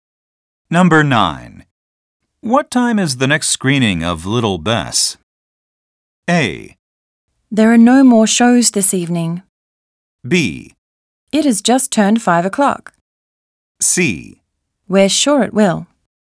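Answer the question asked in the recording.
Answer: A: There are no more shows this evening.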